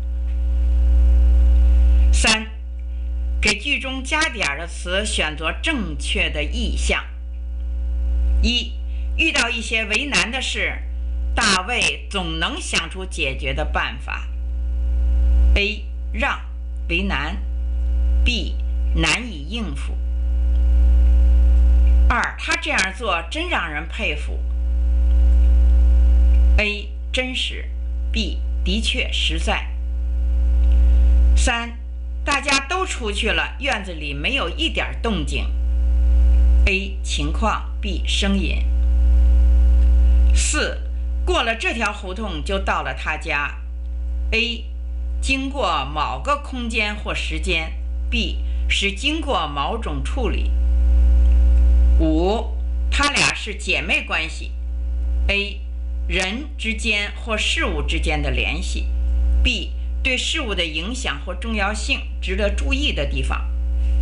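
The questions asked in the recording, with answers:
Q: 遇到一些为难的事,大卫总能想出解决的办法。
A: B: 难以应付

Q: 他这样做真让人佩服。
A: B: 的确实在

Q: 大家都出去了,院子里没有一点动静。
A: B: 声音

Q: 过了这条胡同就到了他家。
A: A: 经过某个空间或时间

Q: 他俩是姐妹关系。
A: A: 人之间或事物之间的联系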